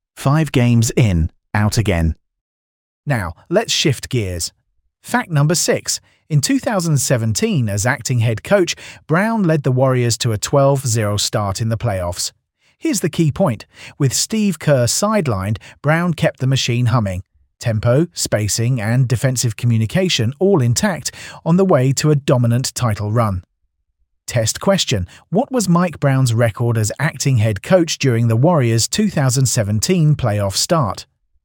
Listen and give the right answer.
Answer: 12-0.